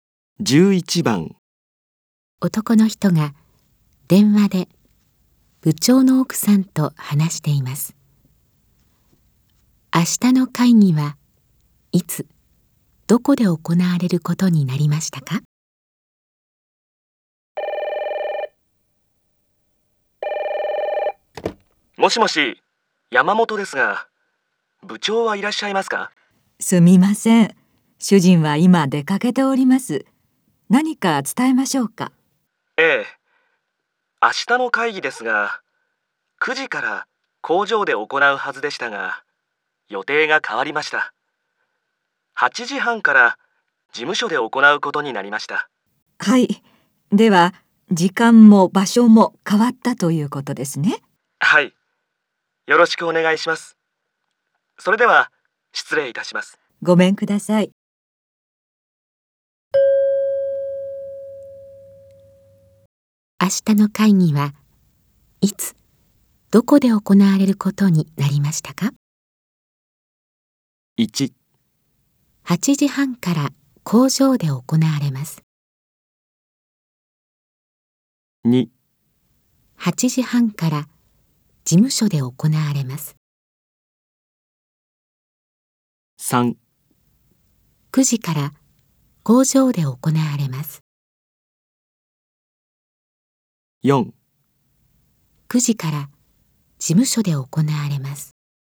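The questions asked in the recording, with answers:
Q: 明日の会議はいつどこで行われることになりましたか?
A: 2: 8時半から事務所で行われます。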